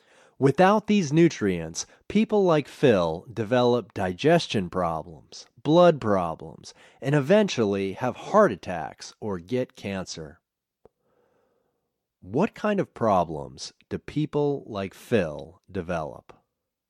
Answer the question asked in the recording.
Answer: People like Phil develop digestion problems, blood problems, and eventually have heart attacks.